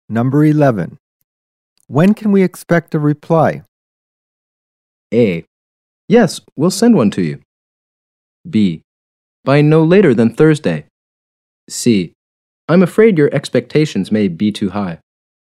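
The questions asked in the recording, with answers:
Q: When can we expect a reply?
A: B: By no later than Thursday.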